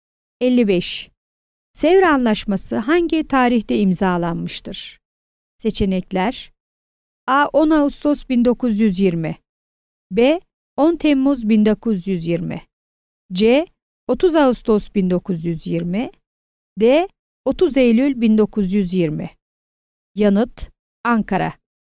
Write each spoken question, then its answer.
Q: Sevr Anlaşması hangi tarihte imzalanmıştır?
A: Yanıt: Ankara.